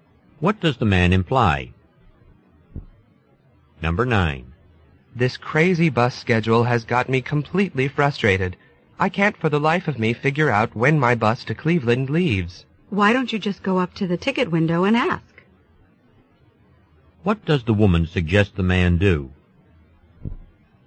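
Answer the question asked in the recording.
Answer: Ask at the ticket window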